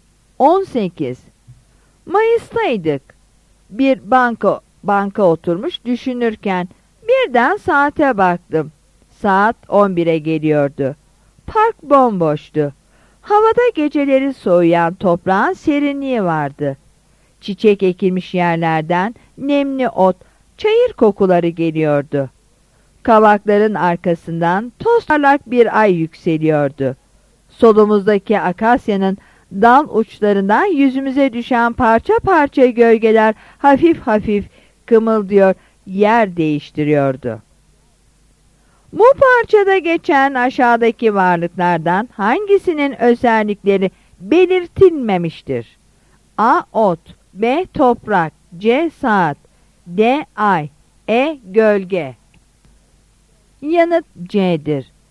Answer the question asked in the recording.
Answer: Yanıt C'dir.